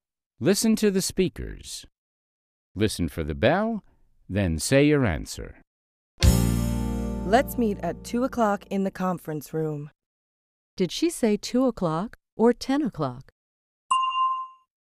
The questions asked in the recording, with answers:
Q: Did she say 2 o'clock or 10 o'clock?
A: She said 2 o'clock.